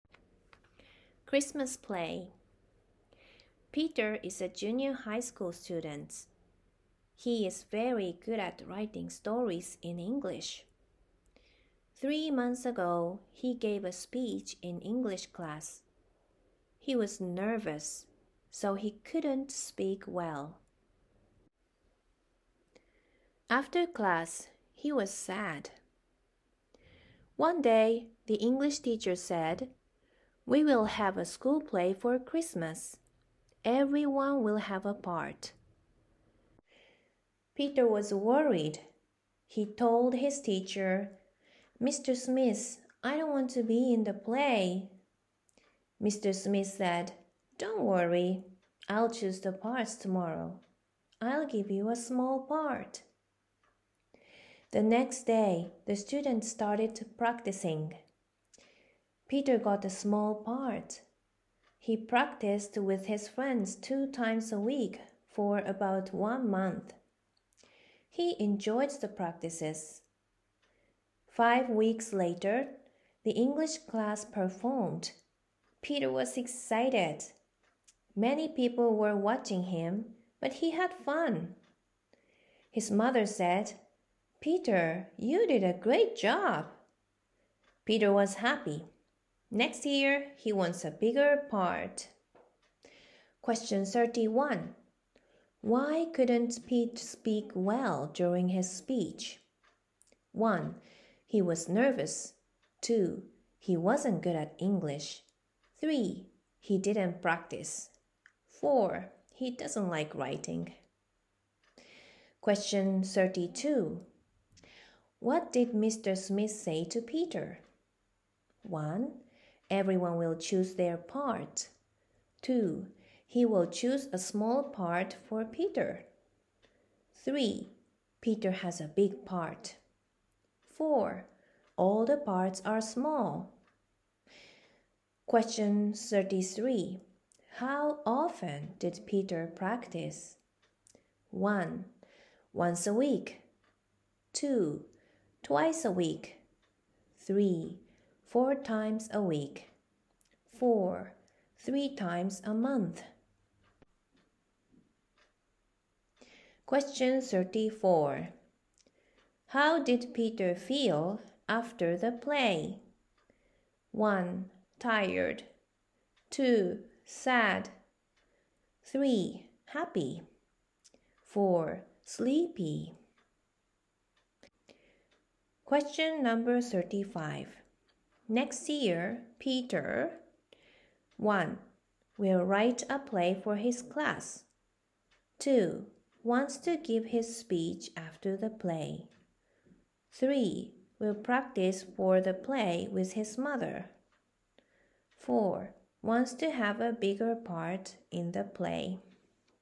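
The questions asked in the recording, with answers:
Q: Why couldn't Pete speak well during his speech?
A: 1: He was nervous.

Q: What did Mr. Smith say to Peter?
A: 2: He will choose a small part for Peter.

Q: How often did Peter practice?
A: 2: Twice a week.

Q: How did Peter feel after the play?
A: 3: Happy.

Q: Next year, Peter...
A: 4: Wants to have a bigger part in the play.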